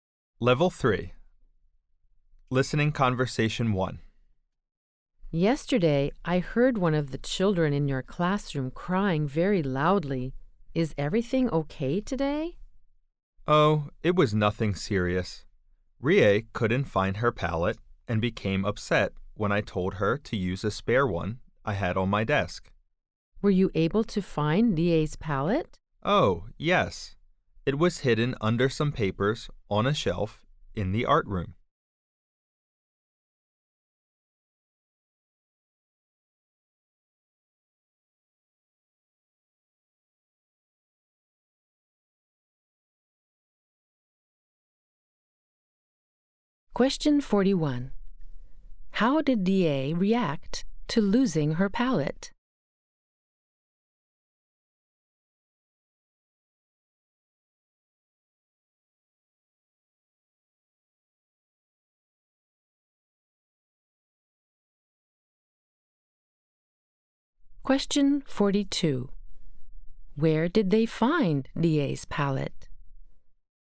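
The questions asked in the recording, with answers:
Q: How did DA react to losing her palette?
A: She cried loudly and got upset.

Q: Where did they find DA's palette?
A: Under some papers on a shelf in the art room.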